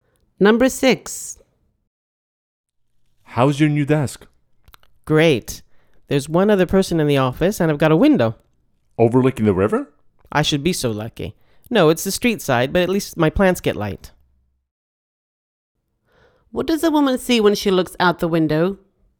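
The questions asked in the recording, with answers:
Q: What does a woman see when she looks out the window?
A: The street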